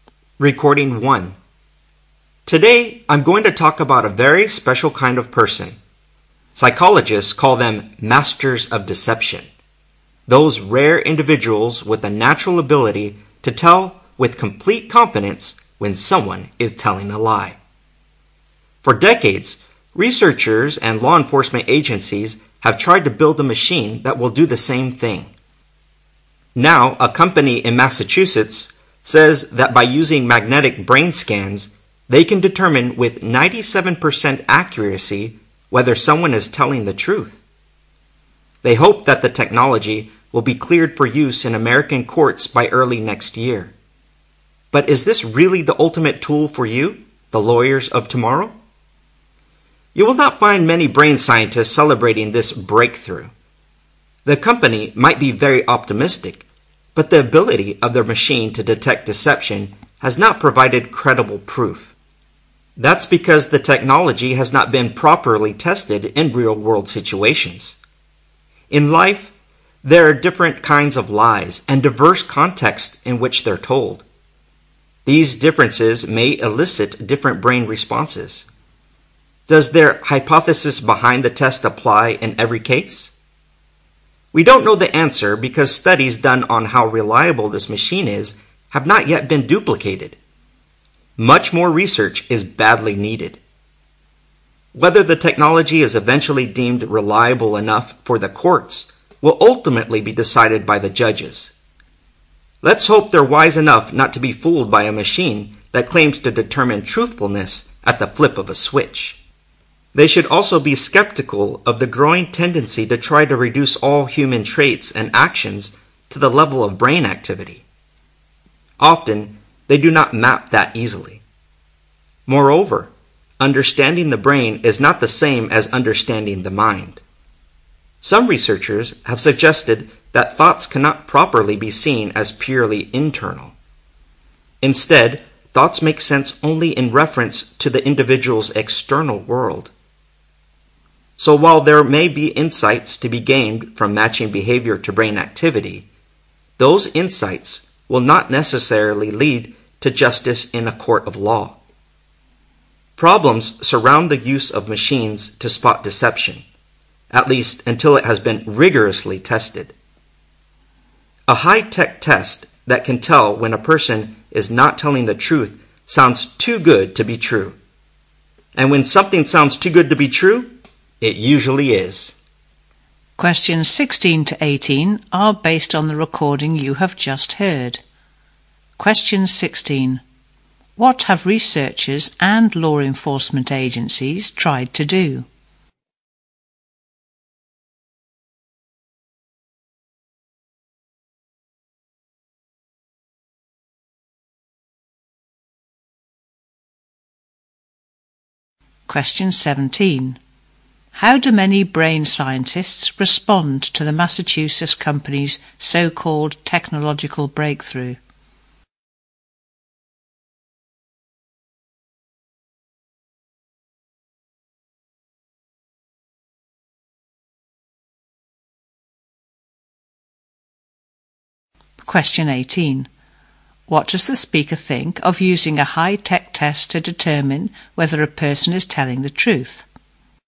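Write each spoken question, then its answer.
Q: What have researchers and law enforcement agencies tried to do?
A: Build a machine that detects lies

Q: How do many brain scientists respond to the Massachusetts company's so-called technological breakthrough?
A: They are skeptical; it lacks credible proof

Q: What does the speaker think of using a high-tech test to determine whether a person is telling the truth?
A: It sounds too good to be true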